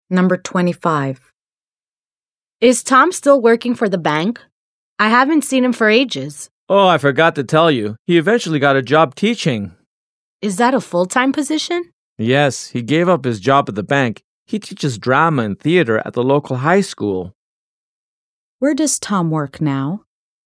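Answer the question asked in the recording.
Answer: At the local high school, teaching drama and theater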